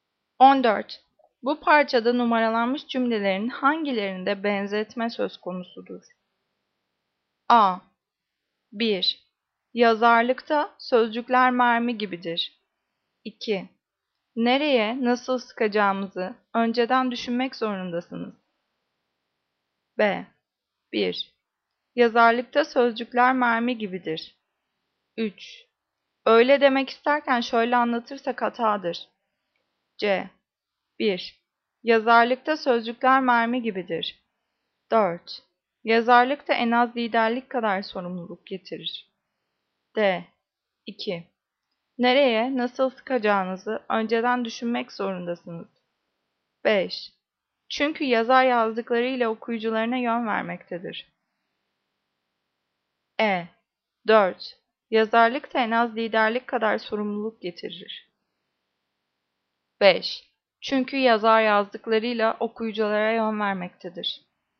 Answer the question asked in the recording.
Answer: Cevap C. 1. Yazarlıkta sözcükler mermi gibidir.